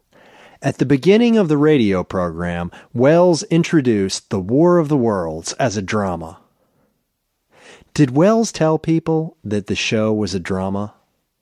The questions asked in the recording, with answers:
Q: Did Welles tell people that the show was a drama?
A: Yes, at the beginning of the program, Welles told people that the show was a drama.